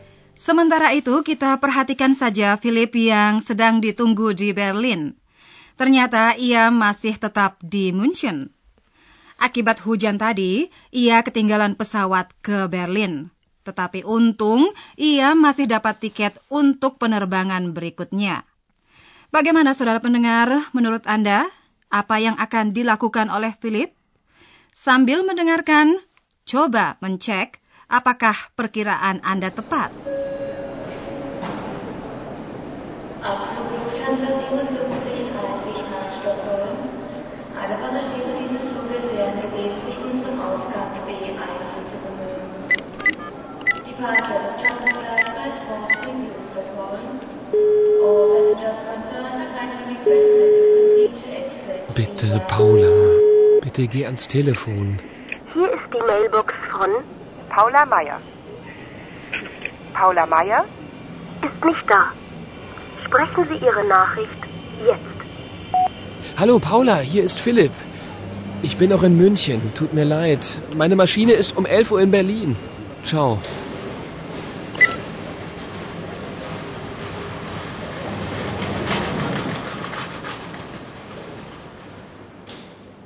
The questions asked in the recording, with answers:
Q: Bagaimana saudara pendengar, menurut Anda, apa yang akan dilakukan oleh Philip?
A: Walau begitu, saya yakin Anda berkesimpulan bahwa Philip berusaha menelpon Paula.